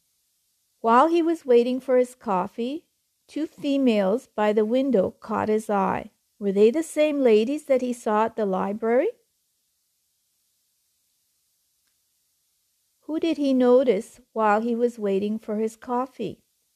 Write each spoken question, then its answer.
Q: Who did he notice while he was waiting for his coffee?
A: He noticed two women by the window.